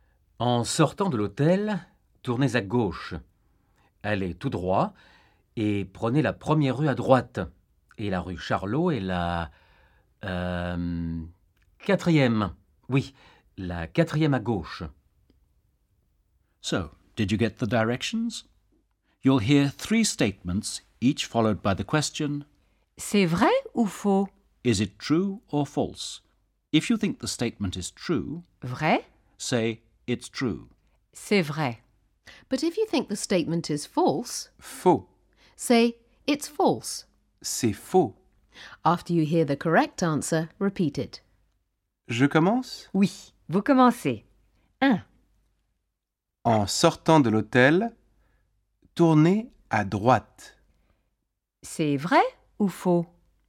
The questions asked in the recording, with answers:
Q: En sortant de l'hôtel, tournez à droite. C'est vrai ou faux?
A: C'est faux. En sortant de l'hôtel... Tournez à gauche.